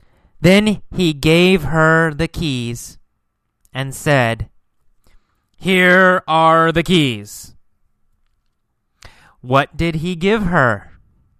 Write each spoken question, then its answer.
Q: What did he give her?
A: The keys, right? The keys to his car.